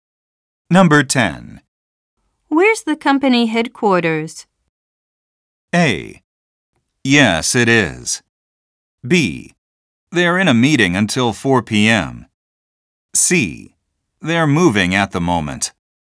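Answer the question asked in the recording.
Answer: C: They're moving at the moment.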